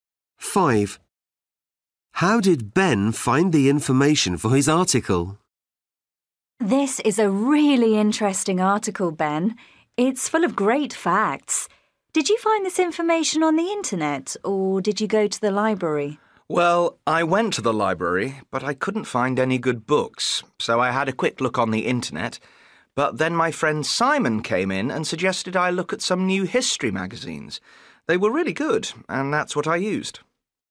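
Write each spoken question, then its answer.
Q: How did Ben find the information for his article?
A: From new history magazines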